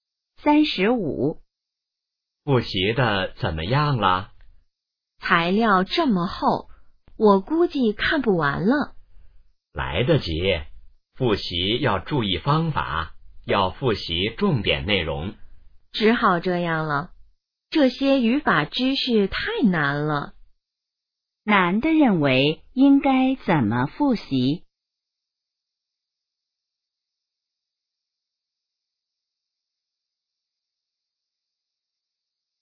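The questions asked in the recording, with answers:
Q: 男的认为应该怎么复习?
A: 复习重点内容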